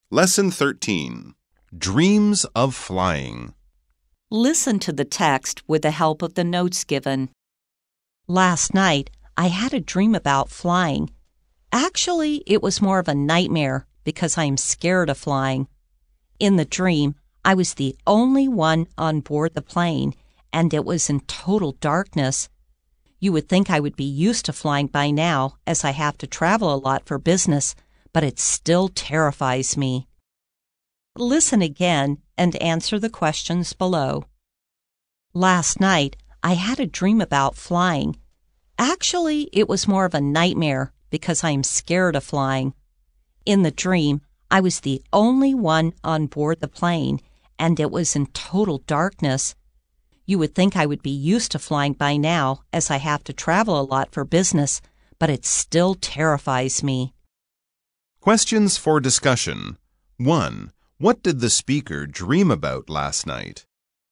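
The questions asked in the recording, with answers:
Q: What did the speaker dream about last night?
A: Flying (alone on a dark plane)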